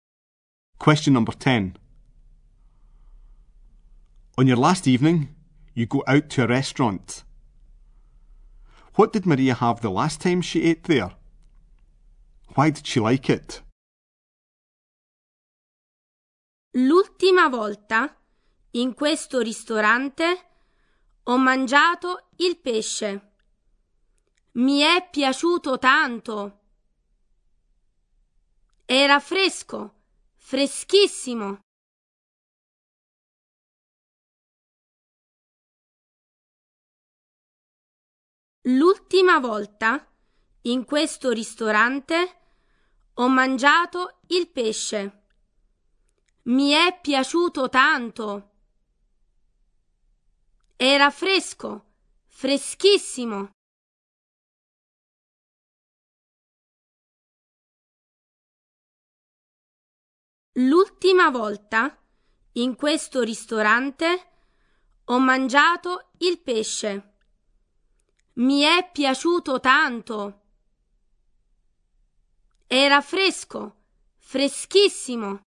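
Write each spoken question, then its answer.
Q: What did Maria have the last time she ate there?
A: Fish

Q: Why did she like it?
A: It was very fresh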